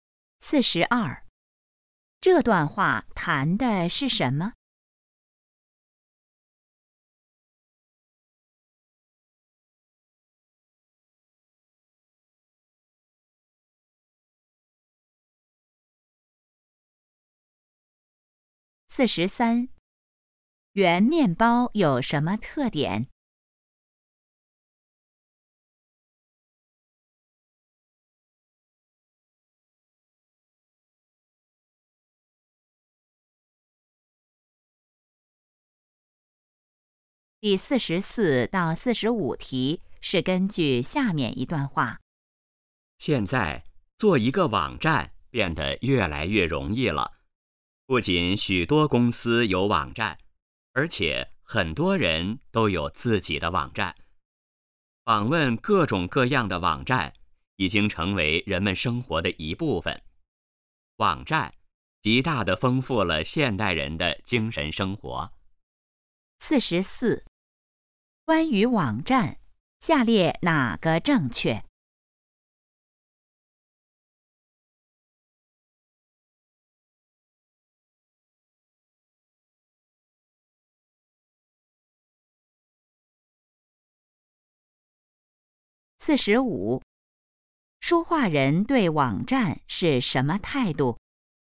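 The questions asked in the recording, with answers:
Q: 关于网站,下列哪个正确?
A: 做网站越来越容易了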